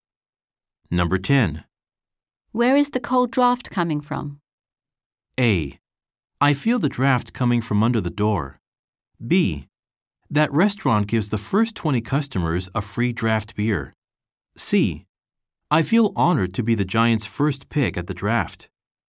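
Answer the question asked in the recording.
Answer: A: I feel the draft coming from under the door.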